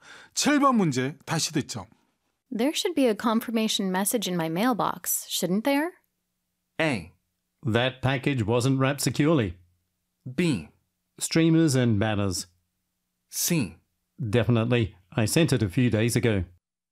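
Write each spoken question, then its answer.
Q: There should be a confirmation message in my mailbox, shouldn't there?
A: C: Definitely. I sent it a few days ago.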